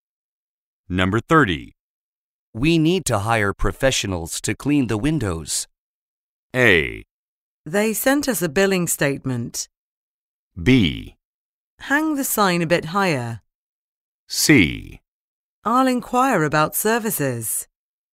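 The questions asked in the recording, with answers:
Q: We need to hire professionals to clean the windows.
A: C: I'll inquire about services.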